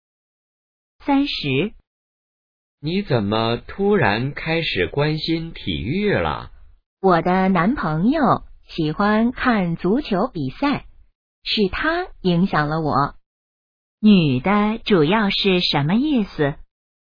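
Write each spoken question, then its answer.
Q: 女的主要是什么意思?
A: 她是受男朋友影响才开始关心体育的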